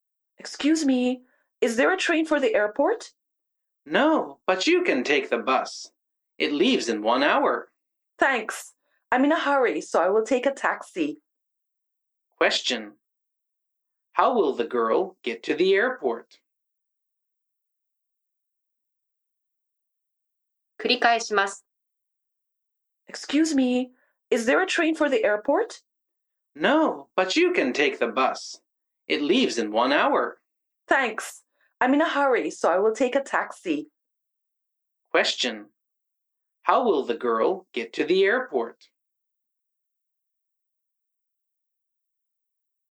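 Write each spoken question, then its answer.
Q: How will the girl get to the airport?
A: By taxi.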